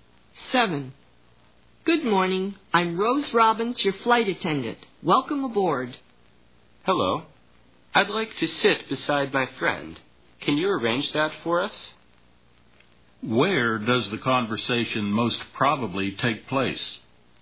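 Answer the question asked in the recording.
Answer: On a plane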